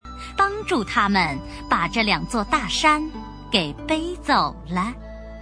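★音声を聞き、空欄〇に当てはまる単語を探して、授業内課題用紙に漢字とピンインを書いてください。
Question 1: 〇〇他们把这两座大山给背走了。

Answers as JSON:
{"1": "帮助"}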